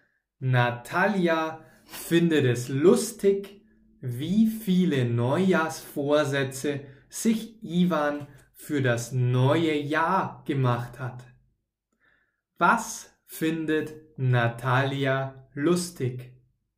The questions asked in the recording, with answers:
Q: Was findet Natalia lustig?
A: Sie findet es lustig, wie viele Neujahrsvorsätze sich Ivan für das neue Jahr gemacht hat.